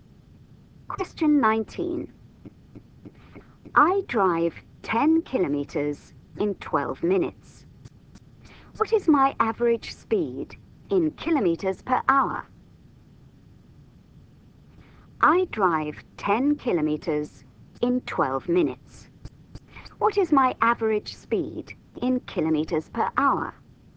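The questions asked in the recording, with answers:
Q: What is my average speed in kilometers per hour?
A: 50 km/h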